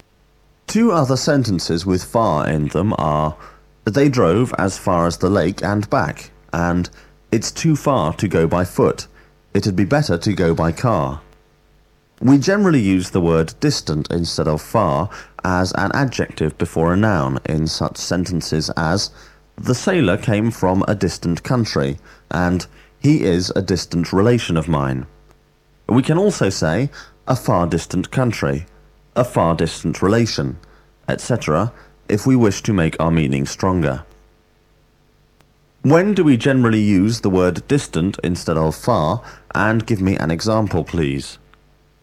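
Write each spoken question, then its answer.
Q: When do we generally use the word distant instead of far, and give me an example, please?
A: as an adjective before a noun, e.g. The sailor came from a distant country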